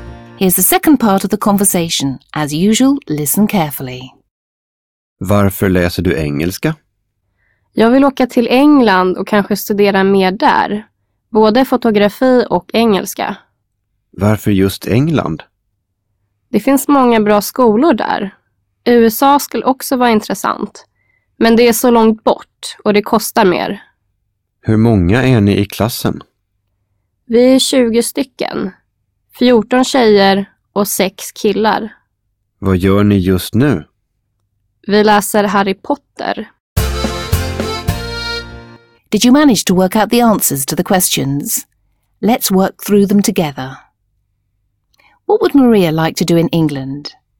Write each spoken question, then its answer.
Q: What would Maria like to do in England?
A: In England, Maria would like to study English and photography.